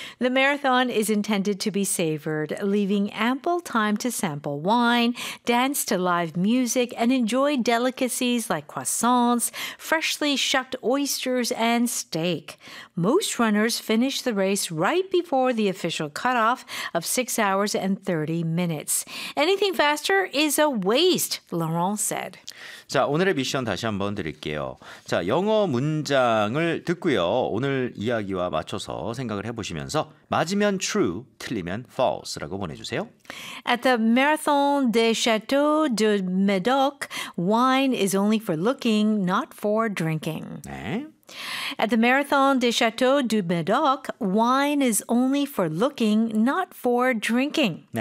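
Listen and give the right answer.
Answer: False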